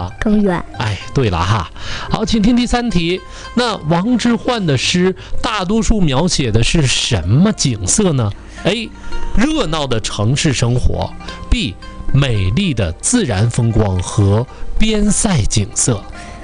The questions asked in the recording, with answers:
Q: 那王之涣的诗大多数描写的是什么景色呢?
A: 第二个。